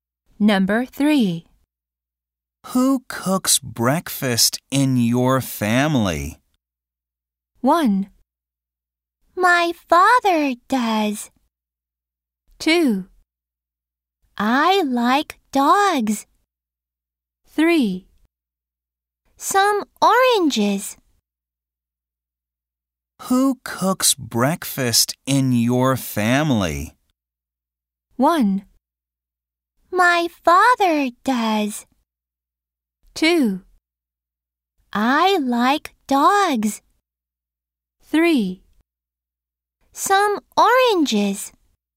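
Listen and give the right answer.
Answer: 1: My father does.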